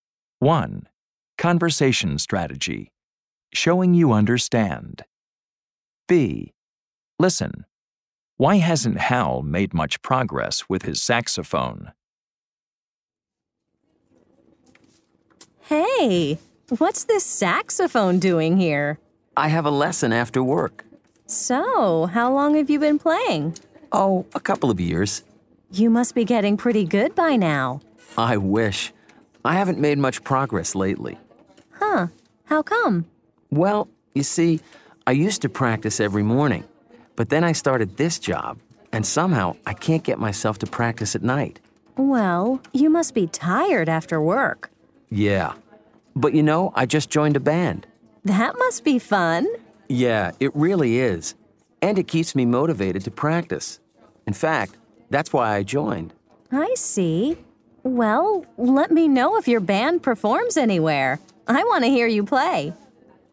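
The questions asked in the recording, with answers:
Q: Why hasn't Hal made much progress with his saxophone?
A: He started a job and can't get himself to practice at night.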